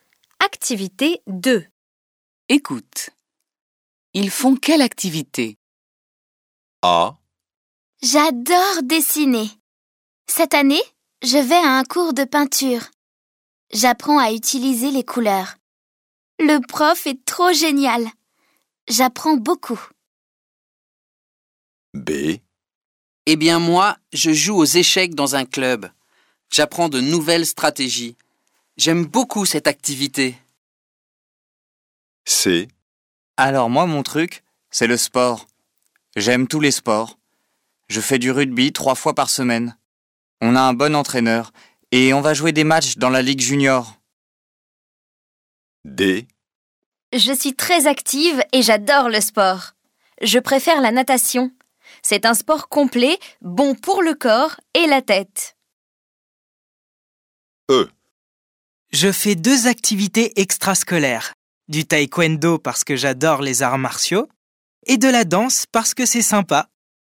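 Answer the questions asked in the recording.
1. peinture
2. échecs
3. rugby
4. natation
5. taekwondo et danse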